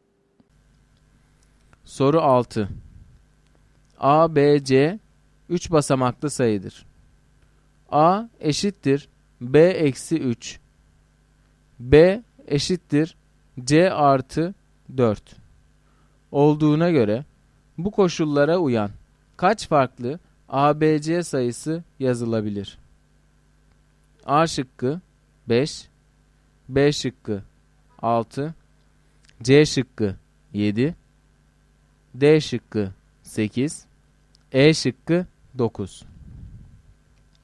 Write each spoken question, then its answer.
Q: A eşittir B eksi 3. B eşittir C artı 4 olduğuna göre bu koşullara uyan kaç farklı ABC sayısı yazılabilir?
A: Doğru cevap B şıkkı.